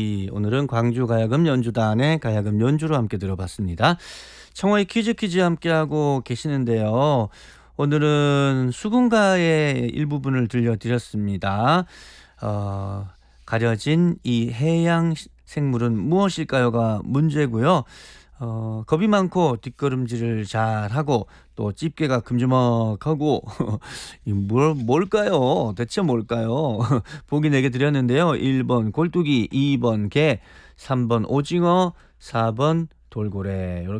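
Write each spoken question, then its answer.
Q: 가려진 이 해양 생물은 무엇일까요가 문제고요.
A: 2번: 게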